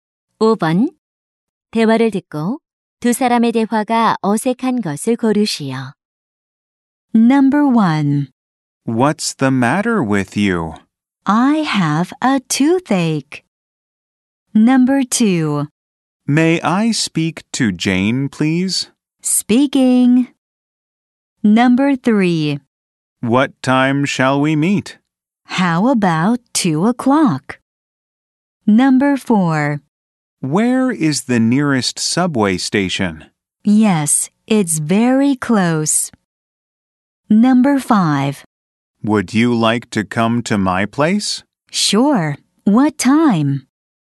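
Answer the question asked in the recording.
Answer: 4: Where is the nearest subway station? / Yes, it's very close.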